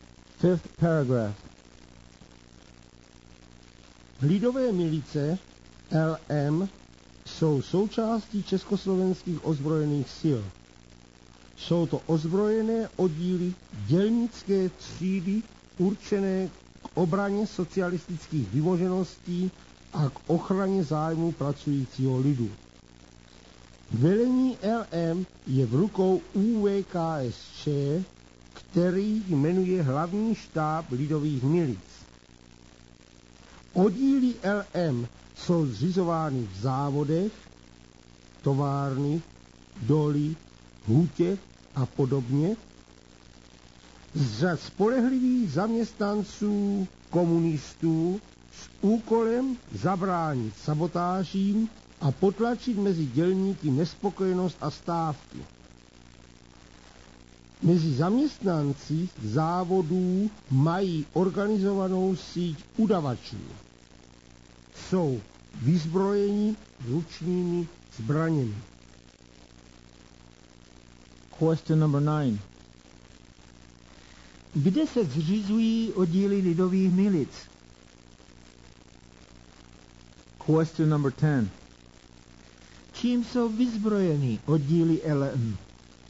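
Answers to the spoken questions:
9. V závodech (továrny, doly, hutě)
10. Ručními zbraněmi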